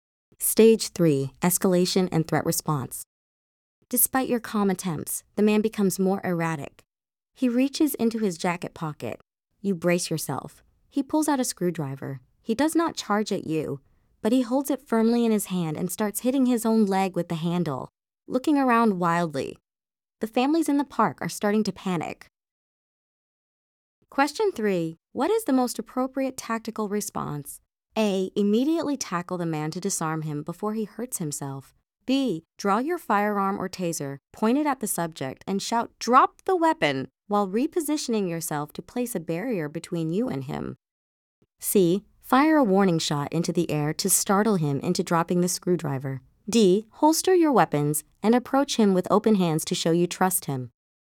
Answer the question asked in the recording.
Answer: the correct answer is B.